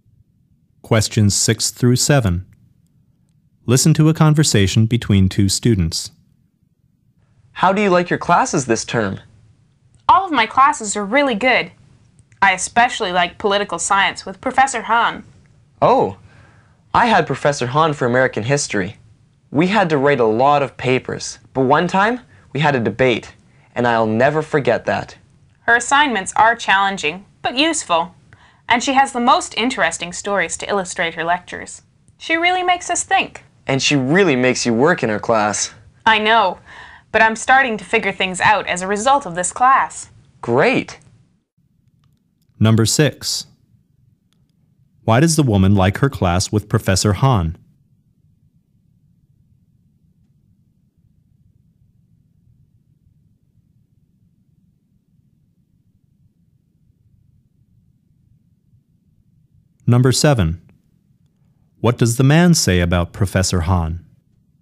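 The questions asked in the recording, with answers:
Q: Why does the woman like her class with Professor Hahn?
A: Her assignments are challenging but useful, and she tells interesting stories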